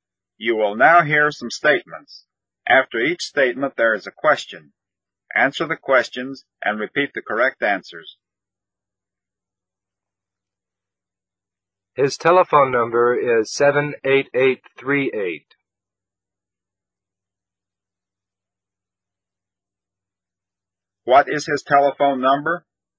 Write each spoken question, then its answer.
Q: What is his telephone number?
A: His telephone number is 78838.